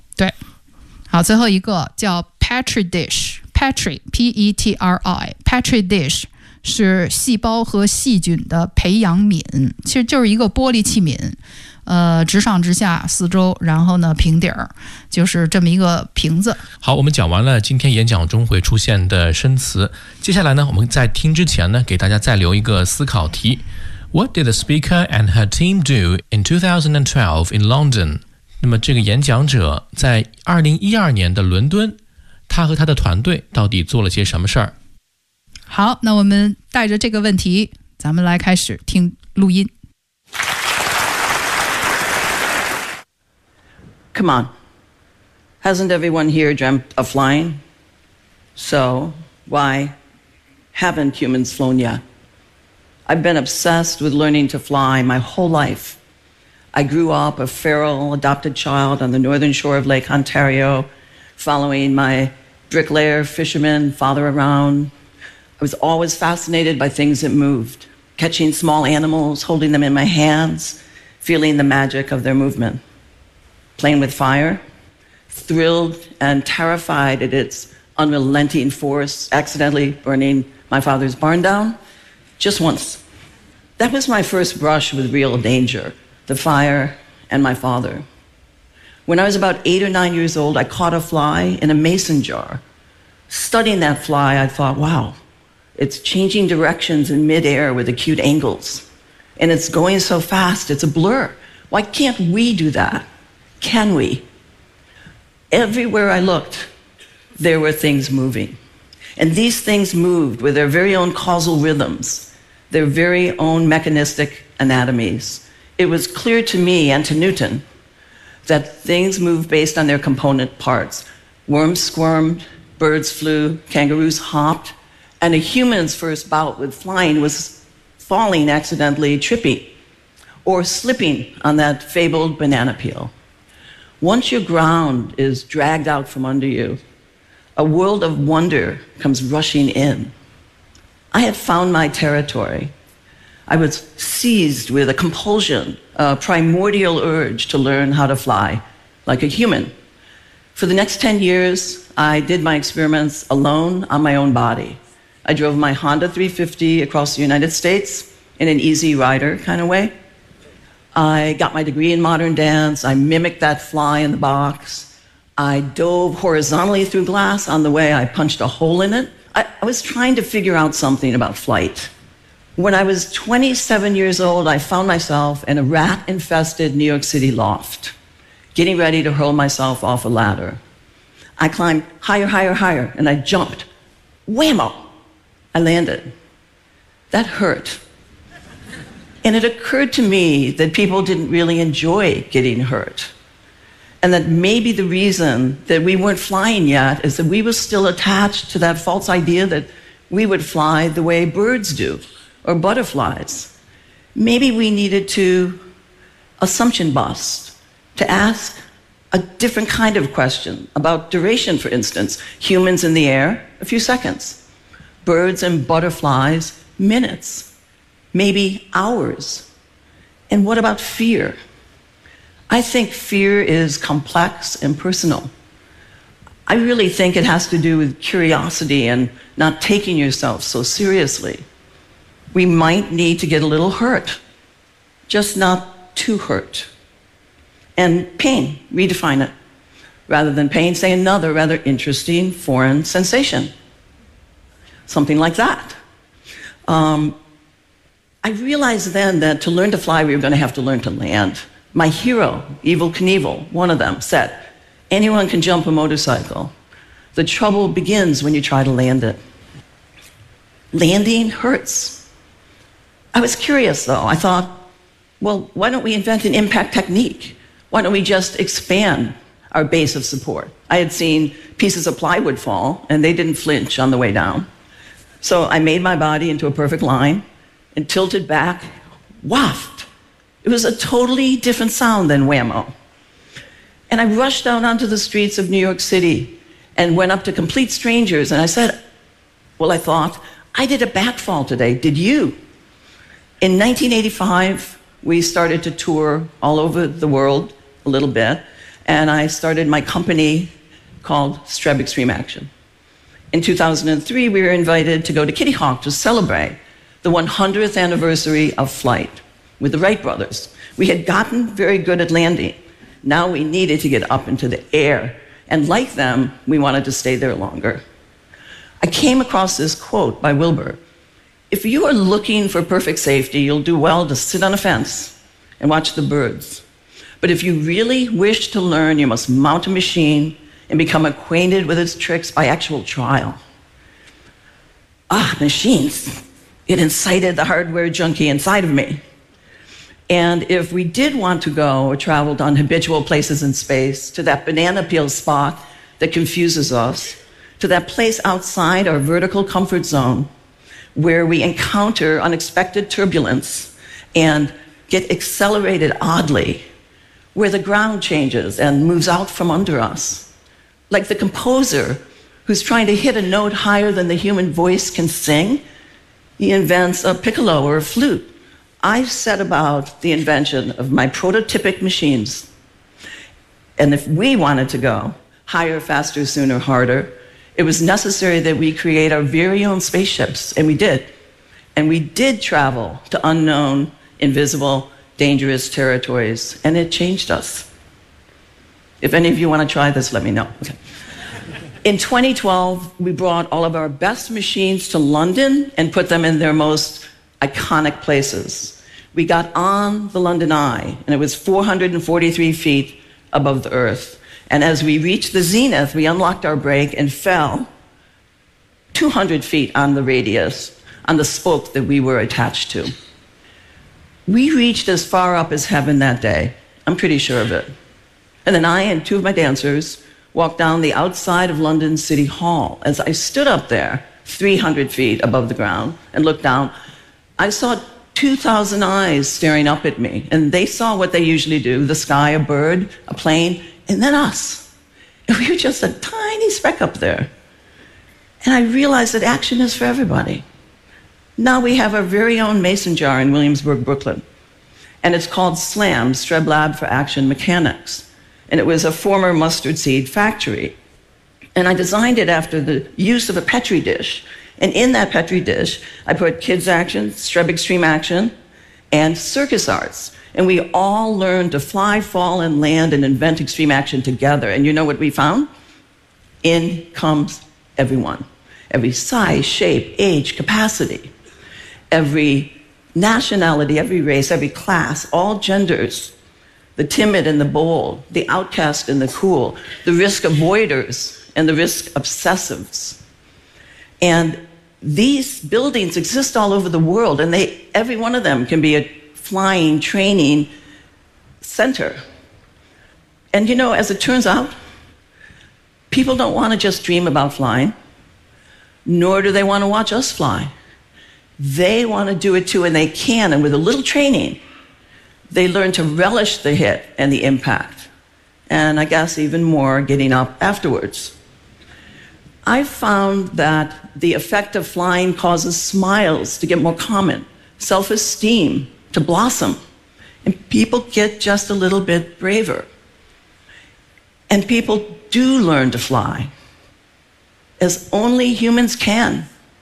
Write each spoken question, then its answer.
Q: What did the speaker and her team do in 2012 in London?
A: In 2012, we brought all of our best machines to London and put them in their most iconic places.